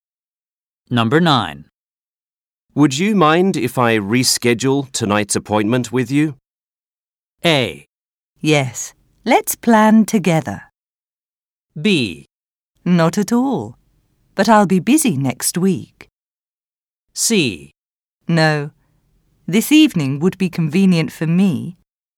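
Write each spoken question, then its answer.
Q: Would you mind if I reschedule tonight's appointment with you?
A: B: Not at all. But I'll be busy next week.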